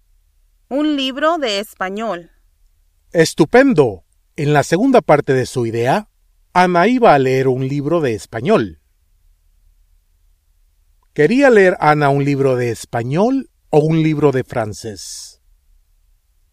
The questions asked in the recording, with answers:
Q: ¿Quería leer Anna un libro de español o un libro de francés?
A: Un libro de español.